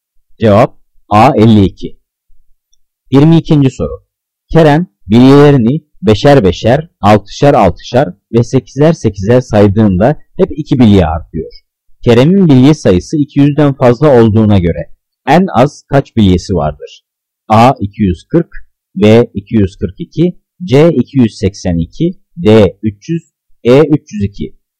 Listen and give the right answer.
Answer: Cevap B 342.